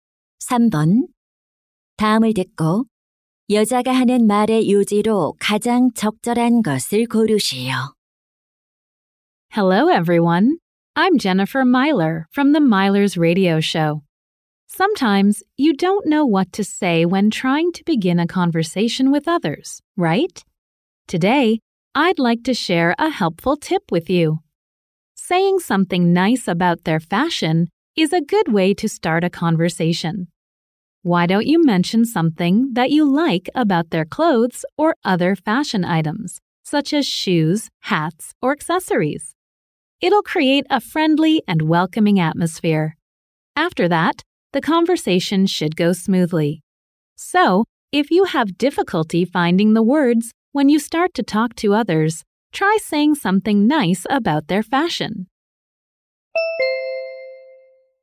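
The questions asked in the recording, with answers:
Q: 다음을 듣고 여자가 하는 말의 요지로 가장 적절한 것을 고르시오.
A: 상대방의 패션을 칭찬하는 것은 대화를 시작하는 좋은 방법이다.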